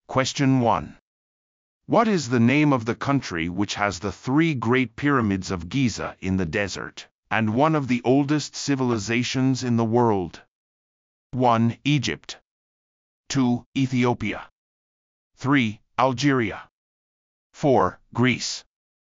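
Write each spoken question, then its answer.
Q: What is the name of the country which has the three great pyramids of Giza in the desert, and one of the oldest civilizations in the world?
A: 1: Egypt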